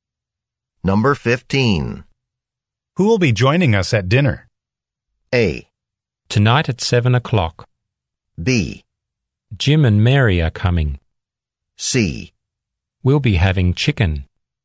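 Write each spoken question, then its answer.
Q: Who will be joining us at dinner?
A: B: Jim and Mary are coming.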